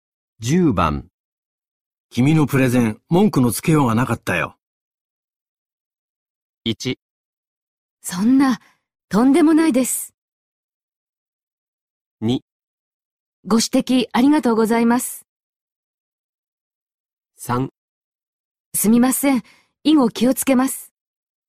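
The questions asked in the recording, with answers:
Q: 君のプレゼン、文句のつけようがなかったよ。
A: 1: そんな、とんでもないです。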